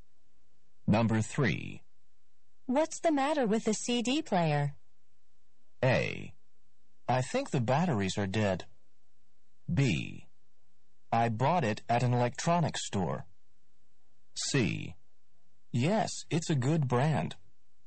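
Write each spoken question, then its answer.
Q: What's the matter with the CD player?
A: A: I think the batteries are dead.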